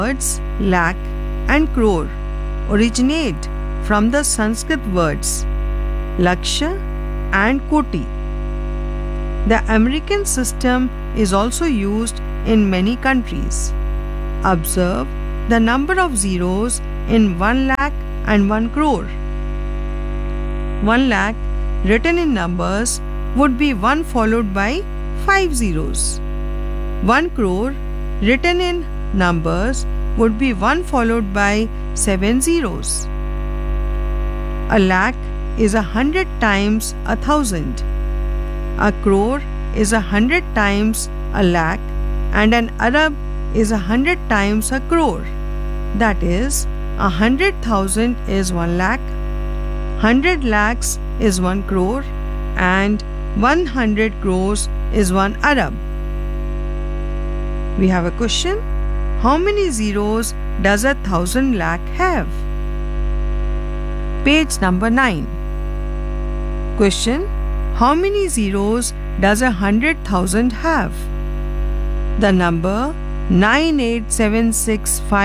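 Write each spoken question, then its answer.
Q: How many zeros does 1,000 lakh have?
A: 8 zeros

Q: How many zeros does 100,000 have?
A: 5 zeros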